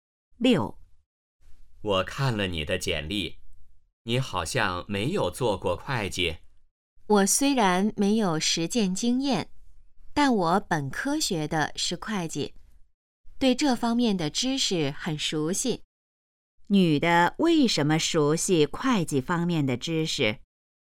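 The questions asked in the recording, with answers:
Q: 女的为什么熟悉会计方面的知识?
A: 她本科学的是会计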